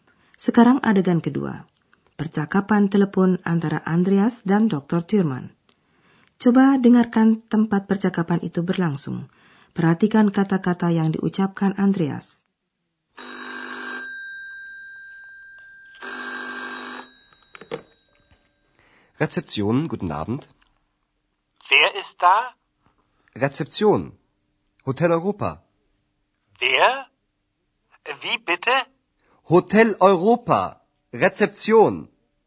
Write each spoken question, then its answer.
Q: Coba dengarkan tempat percakapan itu berlangsung.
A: Andreas menerima telepon di tempat resepsionis, resepsion.